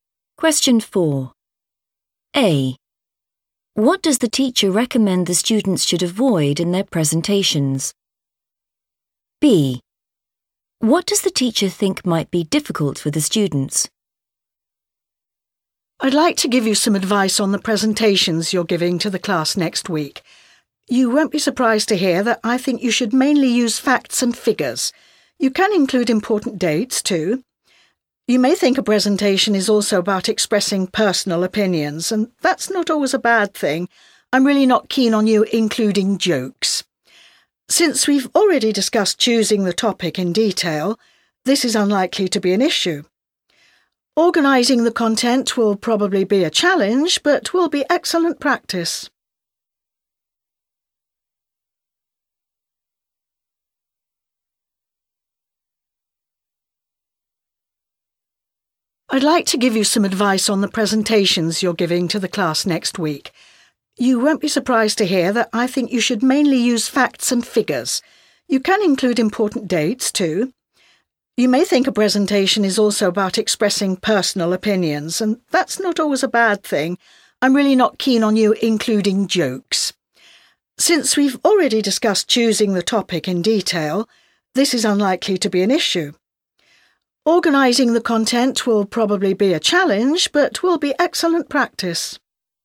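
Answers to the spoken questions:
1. jokes
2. organising the content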